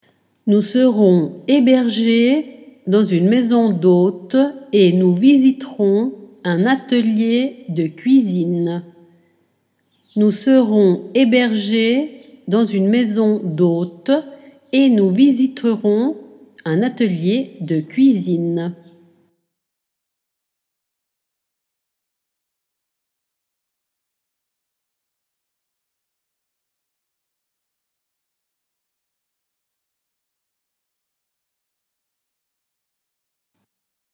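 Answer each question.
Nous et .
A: serons hébergés dans une maison d'hôtes / nous visiterons un atelier de cuisine

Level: Dettato di francese A2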